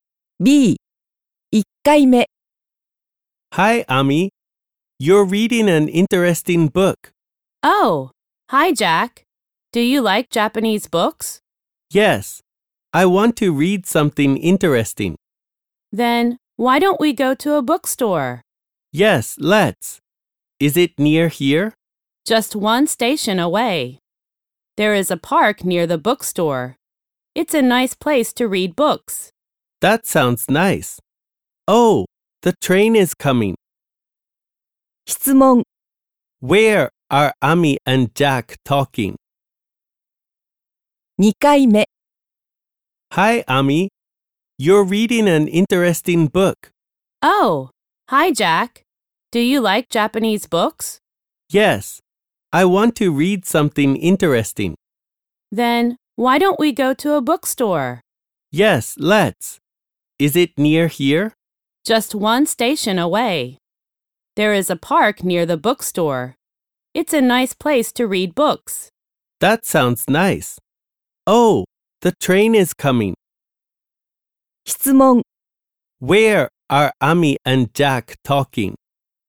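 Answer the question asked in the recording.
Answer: At a train station.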